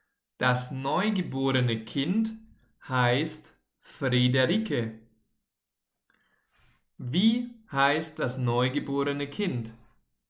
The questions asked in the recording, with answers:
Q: Wie heißt das neugeborene Kind?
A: Frederike. Das neugeborene Kind heißt Friederike.